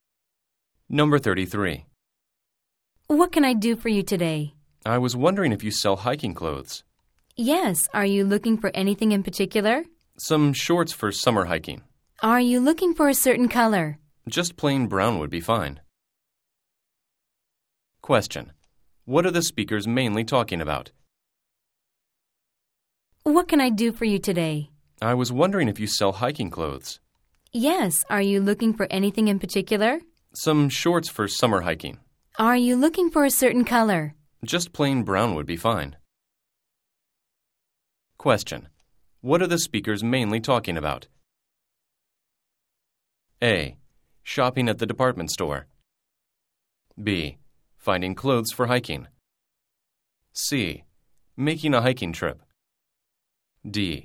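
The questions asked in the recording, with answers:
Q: What are the speakers mainly talking about?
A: B: Finding clothes for hiking.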